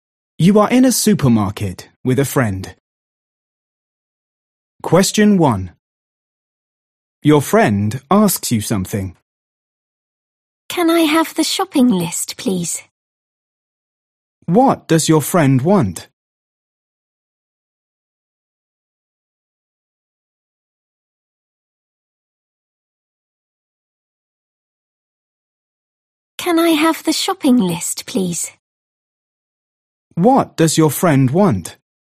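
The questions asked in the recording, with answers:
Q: What does your friend want?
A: the shopping list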